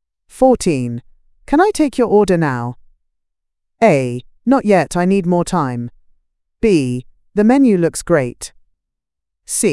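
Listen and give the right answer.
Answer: A: Not yet, I need more time.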